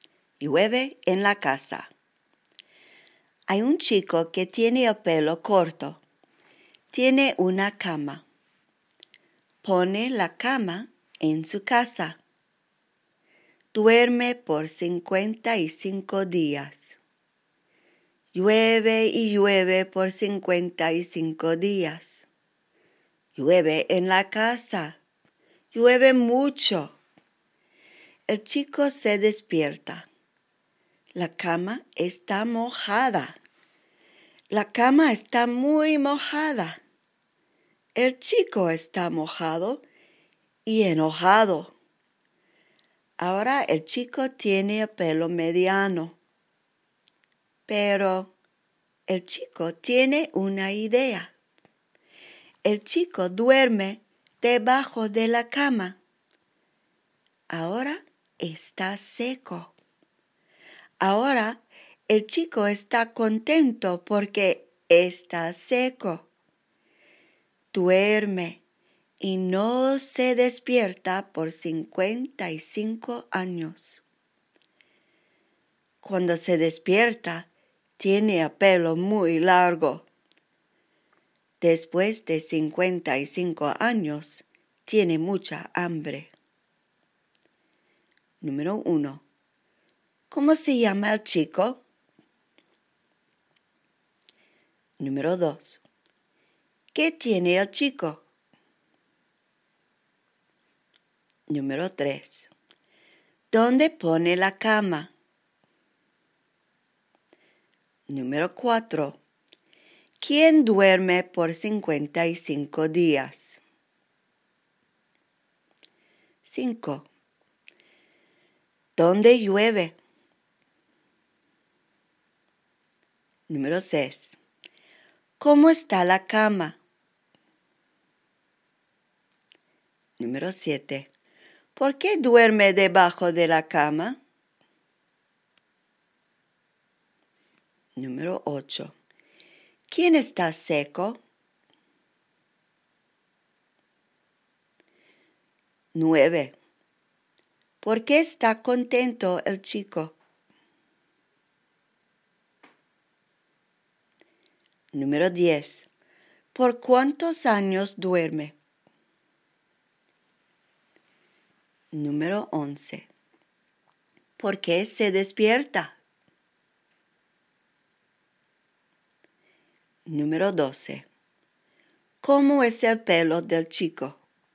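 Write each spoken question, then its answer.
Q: ¿Qué tiene el chico?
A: Una cama (y el pelo corto)

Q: ¿Dónde pone la cama?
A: En su casa

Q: ¿Quién duerme por 55 días?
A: El chico

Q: ¿Dónde llueve?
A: En la casa

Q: ¿Cómo está la cama?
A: Muy mojada

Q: ¿Quién está seco?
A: El chico

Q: ¿Por qué está contento el chico?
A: Porque está seco

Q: ¿Por cuántos años duerme?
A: 55 años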